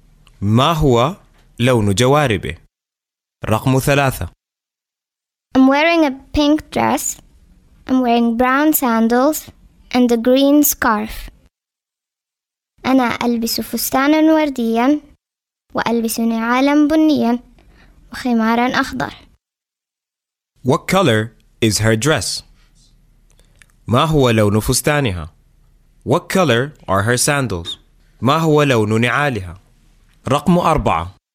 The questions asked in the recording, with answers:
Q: What color is her dress?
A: Pink.

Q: What color are her sandals?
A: Brown.